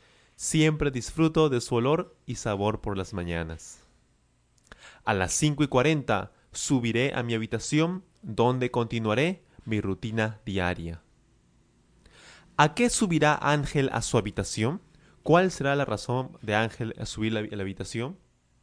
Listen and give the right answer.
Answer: Él subirá a la habitación a continuar con su rutina diaria.